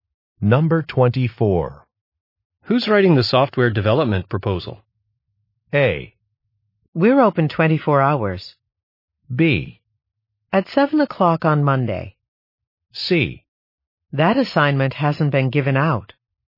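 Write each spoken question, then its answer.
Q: Who's writing the software development proposal?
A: C: That assignment hasn't been given out.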